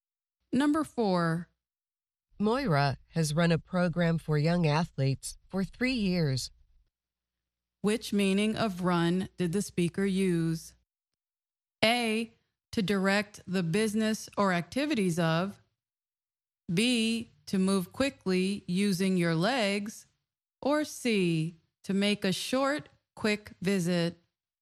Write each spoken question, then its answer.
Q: Which meaning of run did the speaker use?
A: The answer is A, to direct the business or activities of.